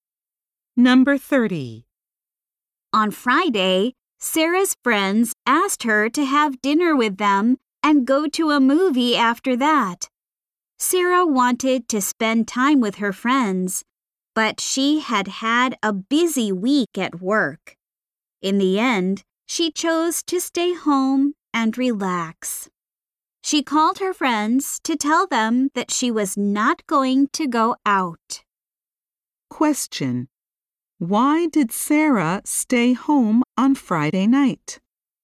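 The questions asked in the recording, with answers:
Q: Why did Sarah stay home on Friday night?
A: She had had a busy week at work and wanted to relax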